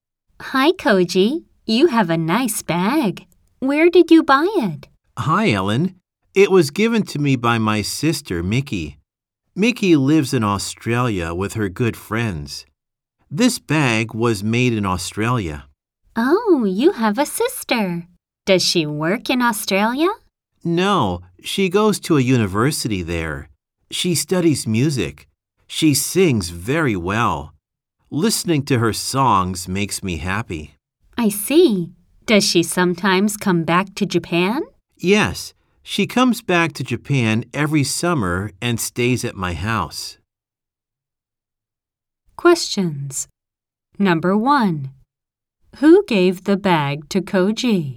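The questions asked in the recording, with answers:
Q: Who gave the bag to Koji?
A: His sister Mickey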